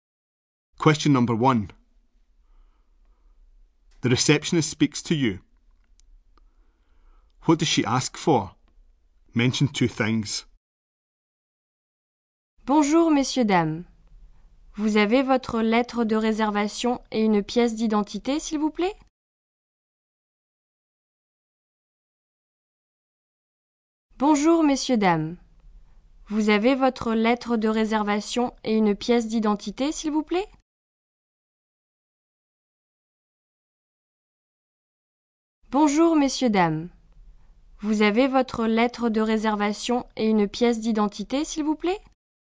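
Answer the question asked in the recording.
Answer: Your booking letter and some identification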